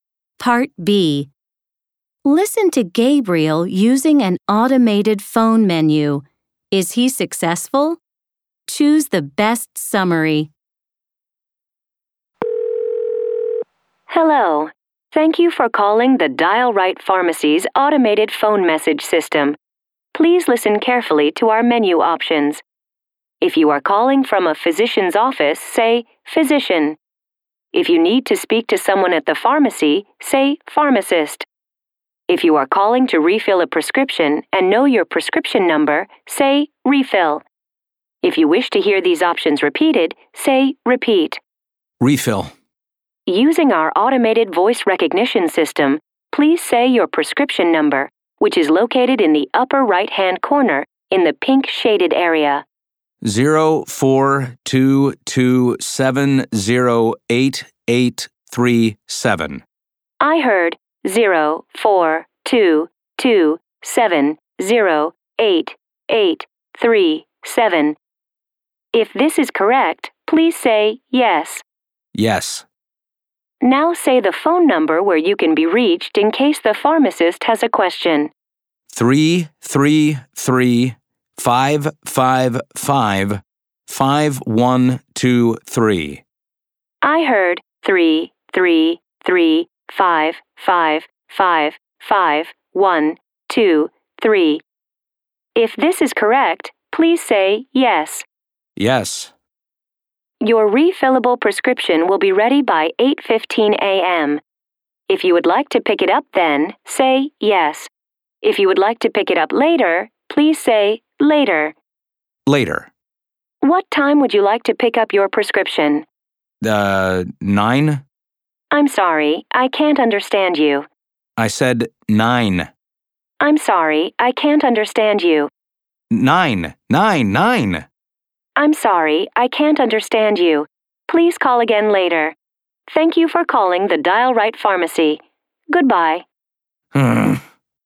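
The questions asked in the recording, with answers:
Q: Is he successful?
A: No, only partly: the refill request works, but the system can't understand his pickup time, so he has to call again later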